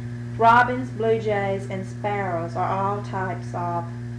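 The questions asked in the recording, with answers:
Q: Robins, blue jays, and sparrows are all types of?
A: birds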